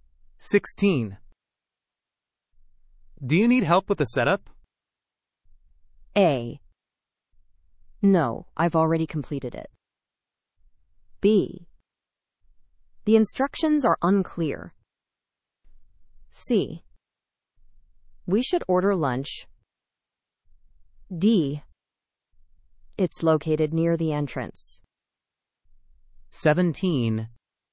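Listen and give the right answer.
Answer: A: No, I've already completed it.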